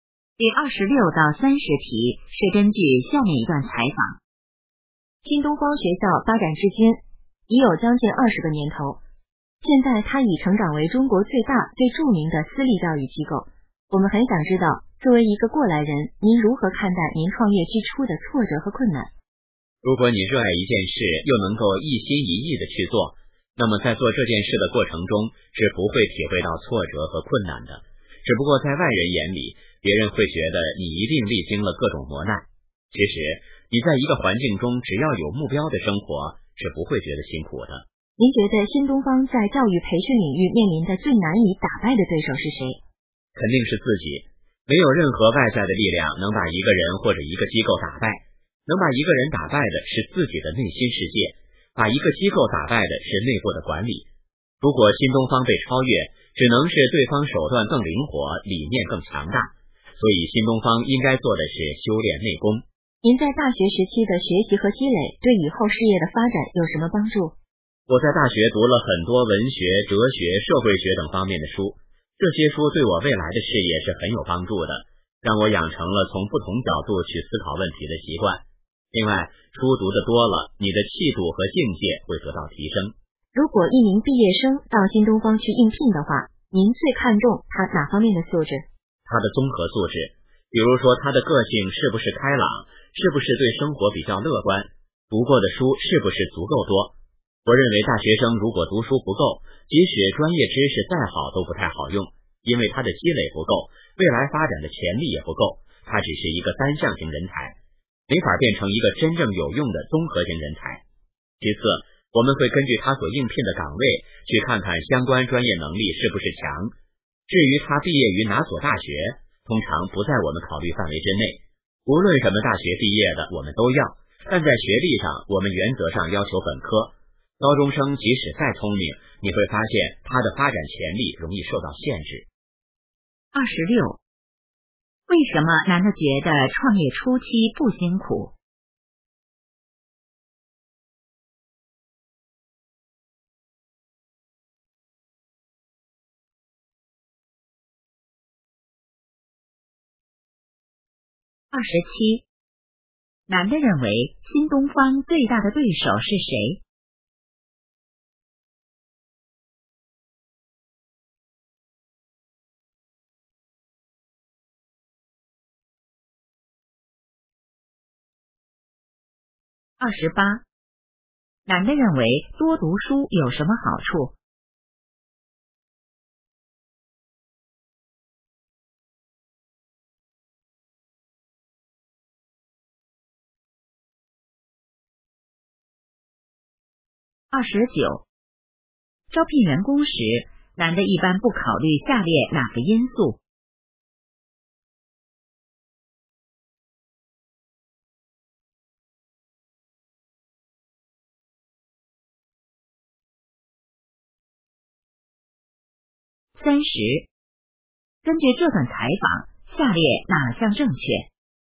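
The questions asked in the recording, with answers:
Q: 为什么男的觉得创业初期不辛苦?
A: 热爱并一心一意去做,有目标

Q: 男的认为新东方最大的对手是谁?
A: 自己

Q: 男的认为多读书有什么好处?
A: 养成从不同角度思考问题的习惯,提升气度和境界

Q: 招聘员工时,男的一般不考虑下列哪个因素?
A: 毕业于哪所大学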